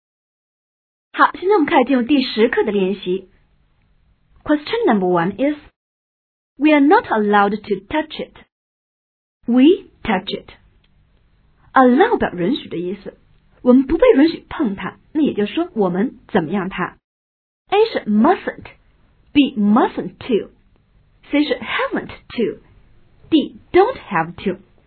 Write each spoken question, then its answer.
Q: we are not allowed to touch it.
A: 但应该是 A. We are not allowed to touch it.